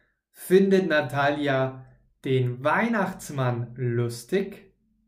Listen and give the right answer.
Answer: Nein, Natalia findet nicht den Weihnachtsmann lustig, sondern sie findet die Neujahrsvorsätze von Ivan lustig.